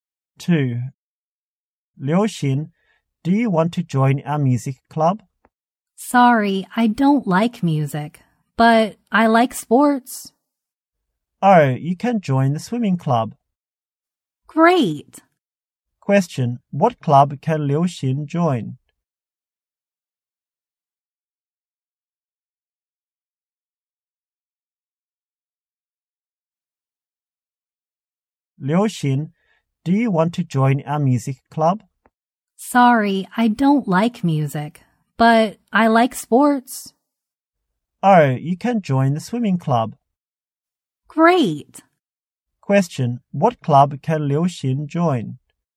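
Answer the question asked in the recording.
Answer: The swimming club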